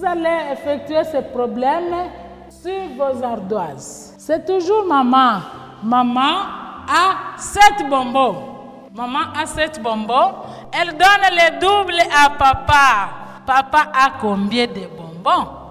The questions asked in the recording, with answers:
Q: Papa a combien de bonbons?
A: 7 bonbons multipliés par 2 égale 14 bonbons.